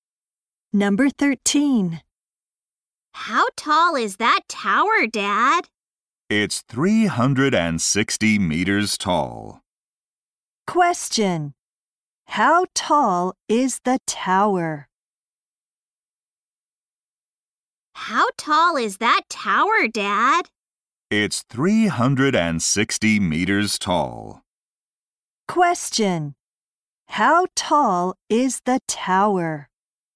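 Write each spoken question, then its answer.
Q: How tall is the tower?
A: 360 meters tall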